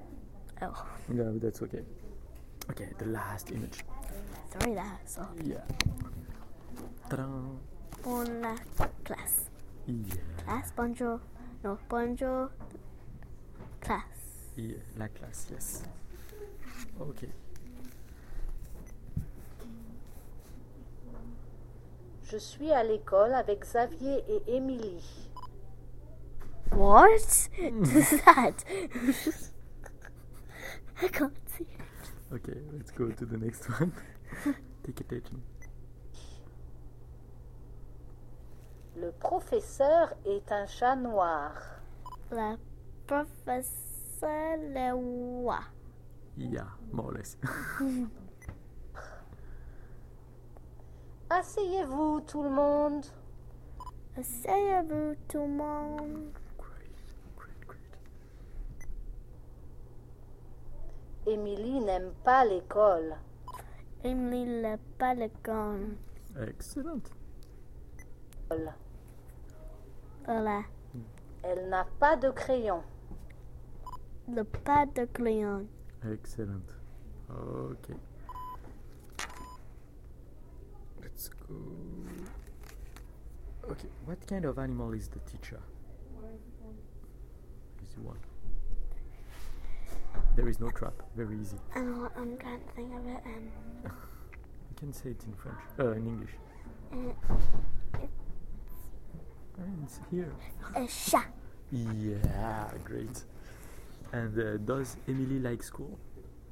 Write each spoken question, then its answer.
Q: what kind of animal is the teacher?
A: A chat.

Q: And does Emily like school?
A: No, she doesn't like it.